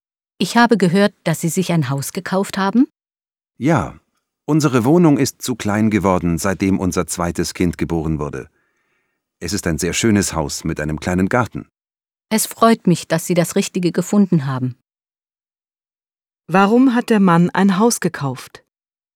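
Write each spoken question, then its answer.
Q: Warum hat der Mann ein Haus gekauft?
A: Die Wohnung ist seit der Geburt des zweiten Kindes zu klein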